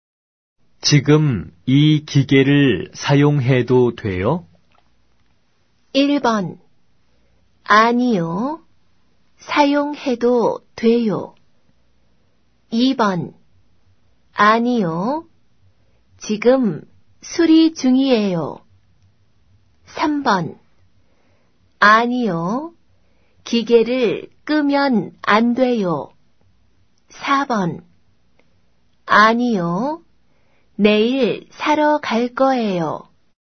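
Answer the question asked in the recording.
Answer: 2: 아니요. 지금 수리 중이에요.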